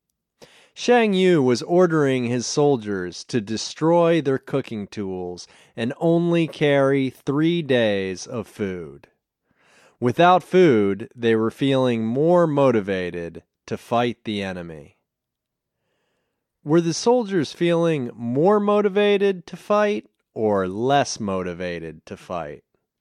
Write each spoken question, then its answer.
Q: Were the soldiers feeling more motivated to fight or less motivated to fight?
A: They were feeling more motivated to fight.